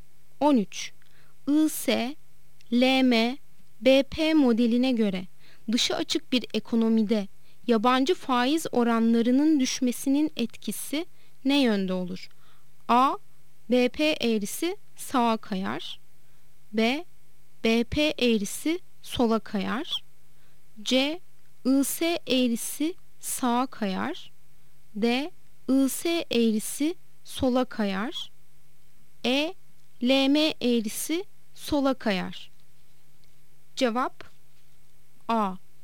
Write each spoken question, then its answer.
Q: IS, LM, BP modeline göre dışı açık bir ekonomide yabancı faiz oranlarının düşmesinin etkisi ne yönde olur?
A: Cevap A. BP eğrisi sağa kayar.